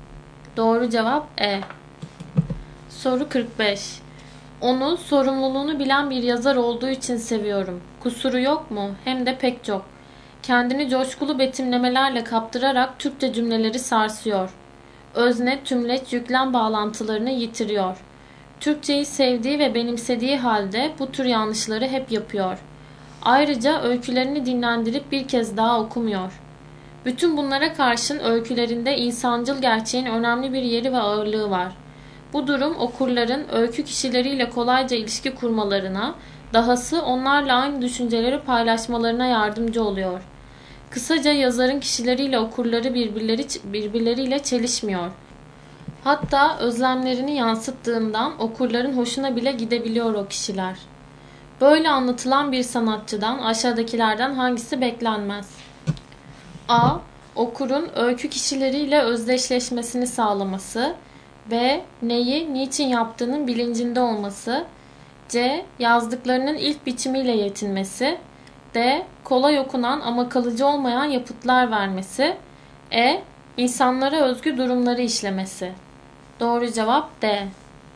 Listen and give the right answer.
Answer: Doğru cevap D.